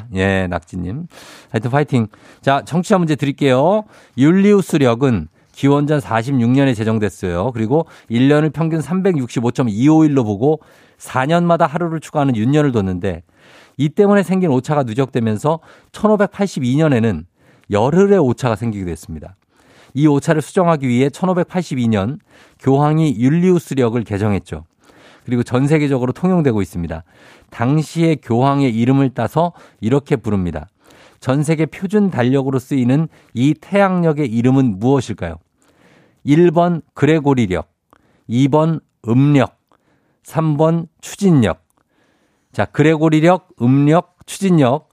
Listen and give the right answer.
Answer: 그레고리력입니다.